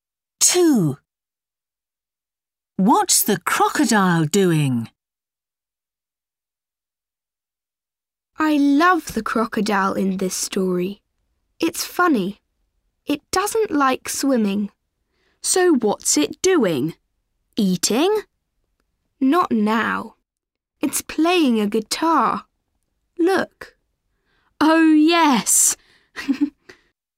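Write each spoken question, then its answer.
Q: What's the crocodile doing?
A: Playing a guitar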